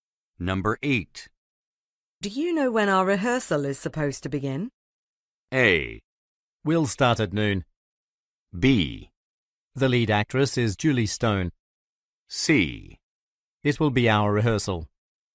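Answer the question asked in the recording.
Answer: A: We'll start at noon.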